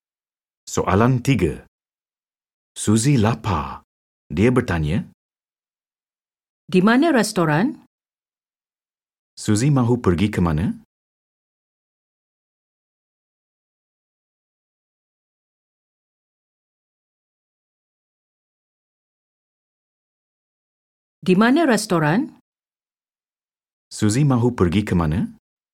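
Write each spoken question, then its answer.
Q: Suzy mahu pergi ke mana?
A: Restoran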